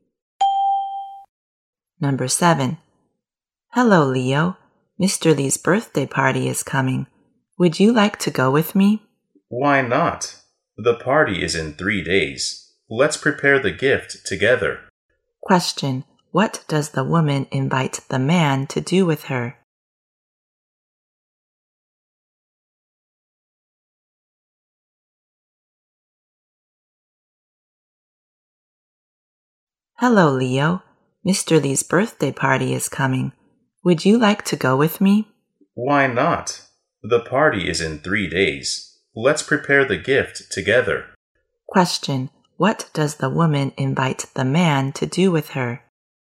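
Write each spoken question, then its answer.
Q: What does the woman invite the man to do with her?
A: Go to Mr. Lee's birthday party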